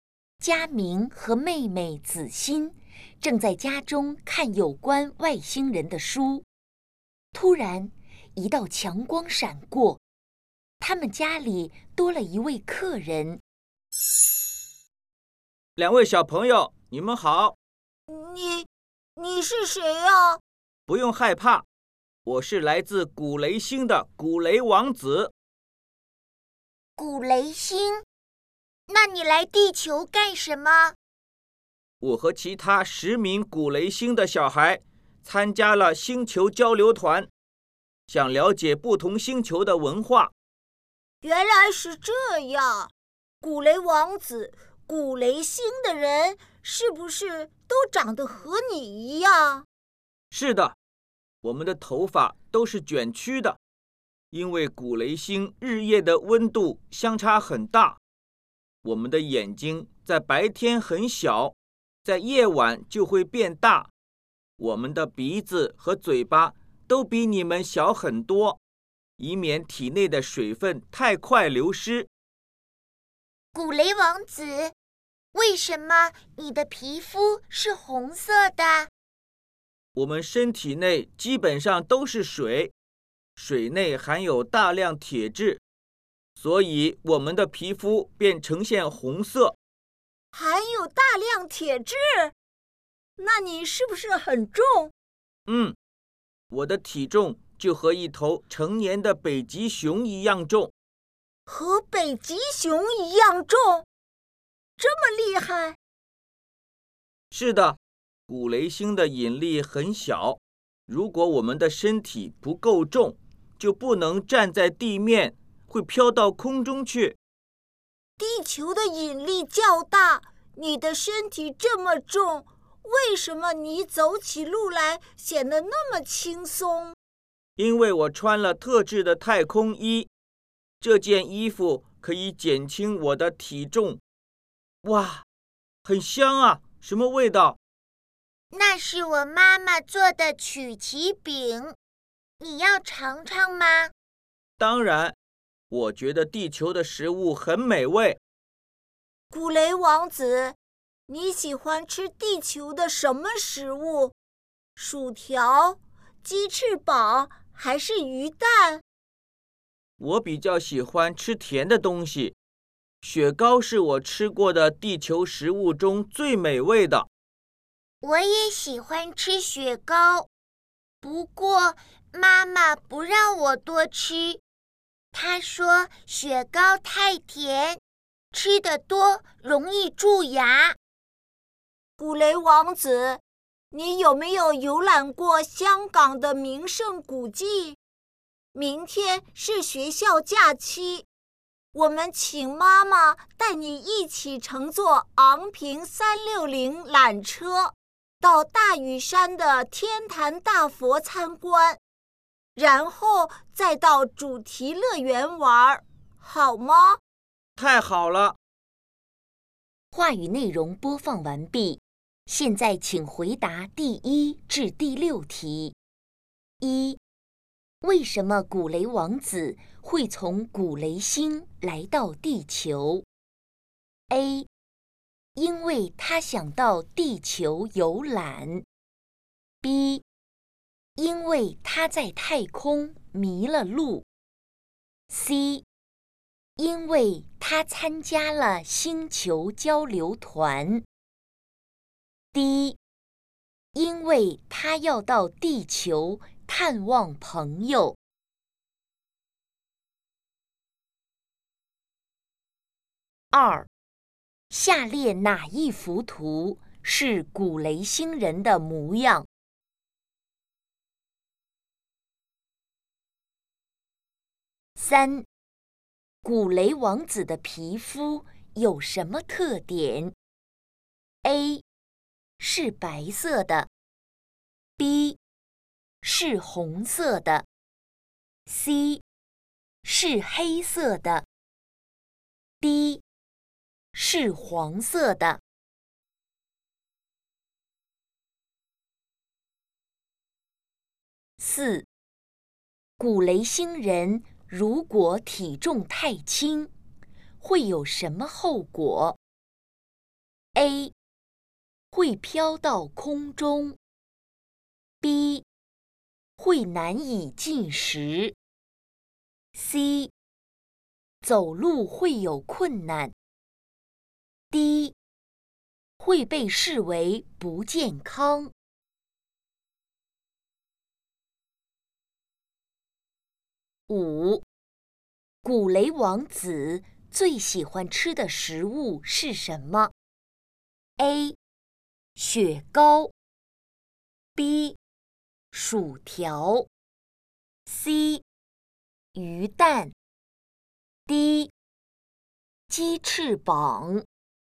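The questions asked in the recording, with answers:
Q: 为什么古雷王子会从古雷星来到地球?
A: C: 因为他参加了星球交流团。

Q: 古雷王子的皮肤有什么特点?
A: B: 是红色的

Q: 古雷星人如果体重太轻,会有什么后果 ?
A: A: 会飘到空中

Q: 古雷王子最喜欢吃的食物是什么 ?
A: A: 雪糕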